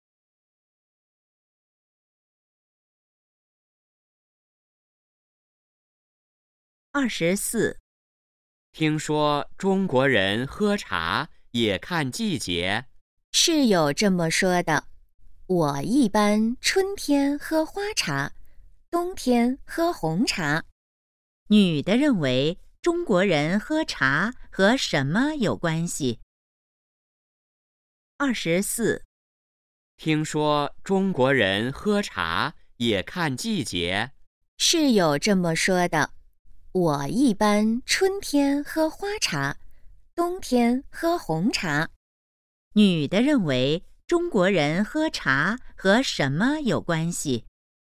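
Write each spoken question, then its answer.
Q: 女的认为中国人喝茶和什么有关系?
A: 季节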